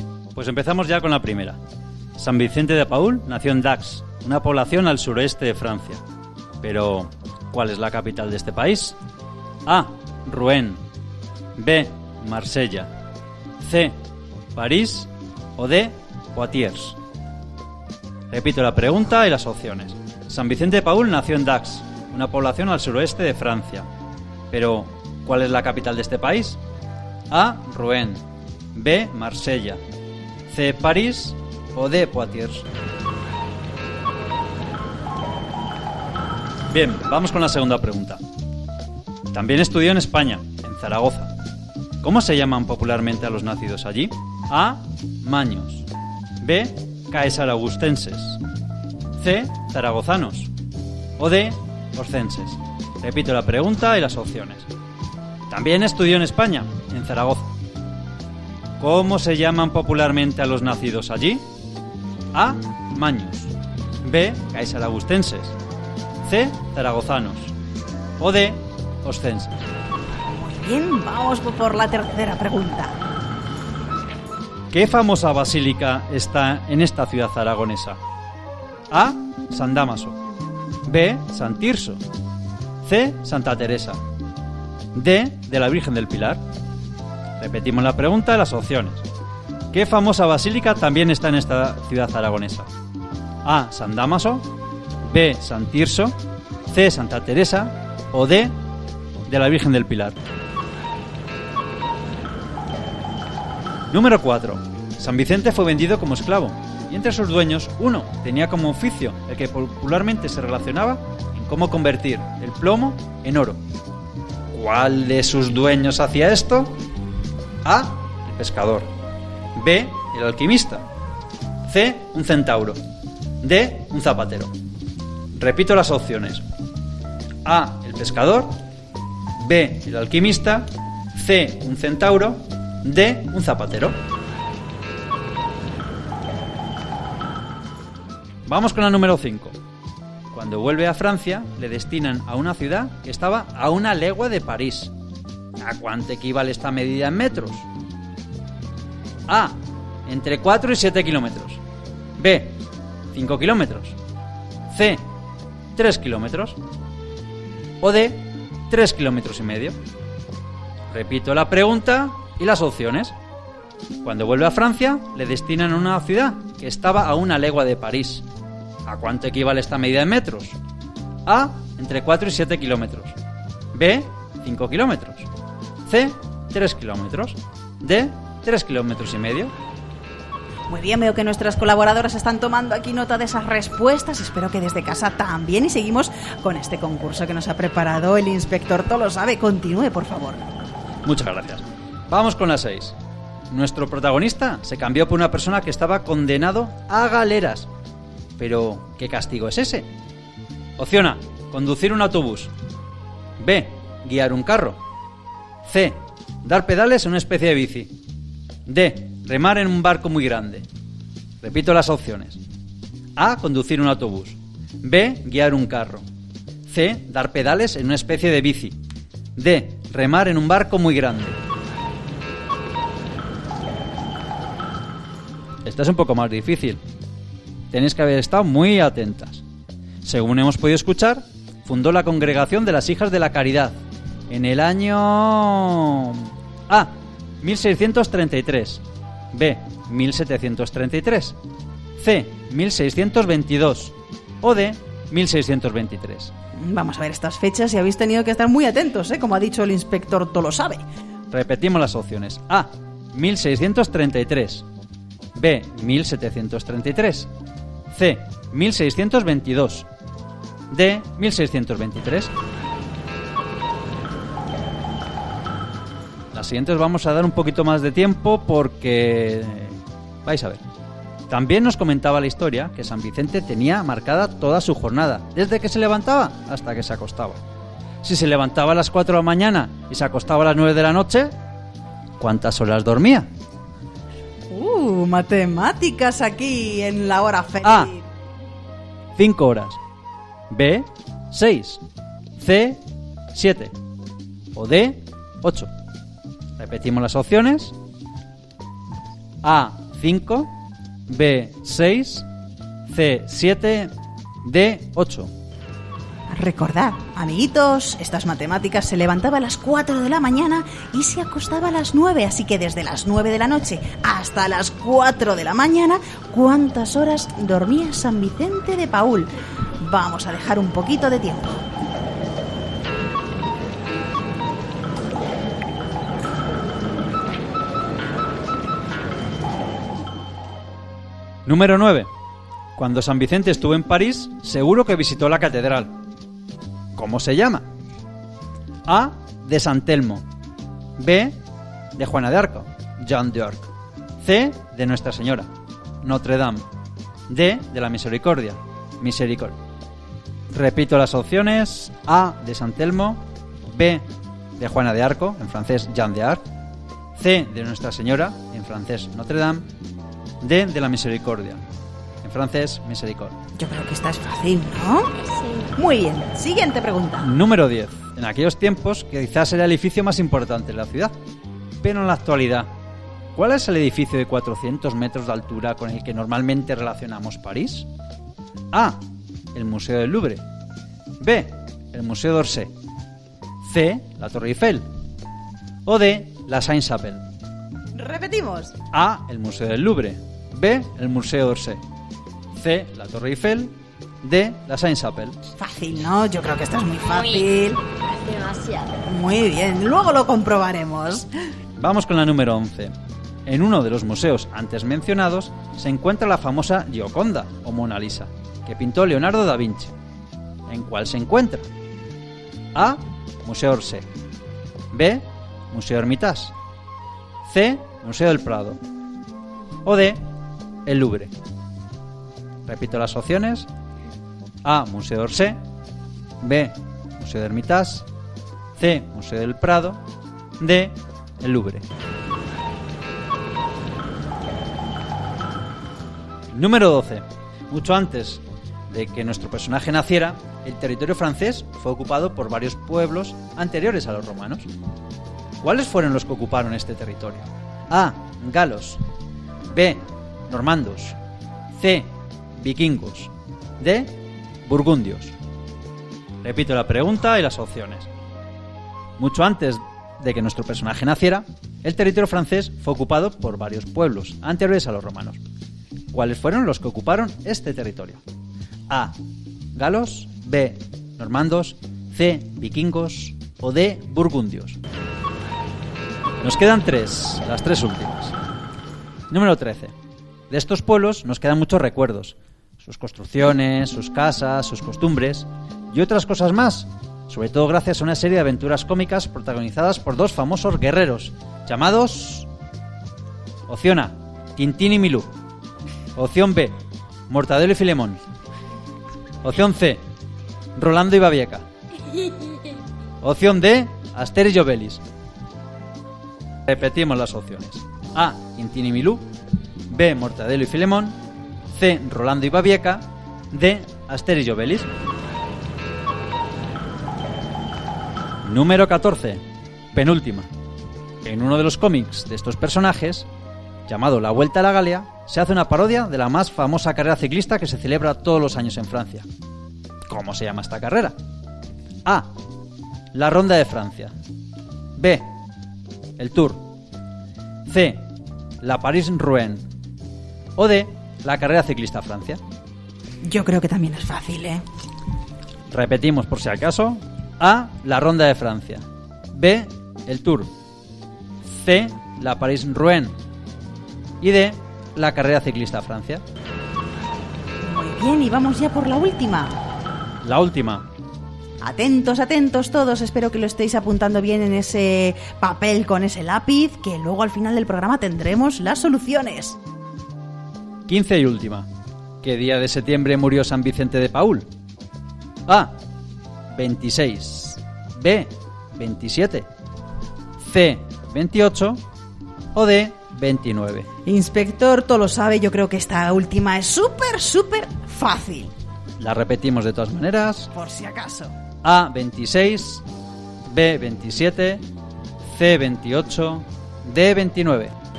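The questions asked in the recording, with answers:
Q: Si se levantaba a las 4 de la mañana y se acostaba a las 9 de la noche, ¿cuántas horas dormía?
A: C: 7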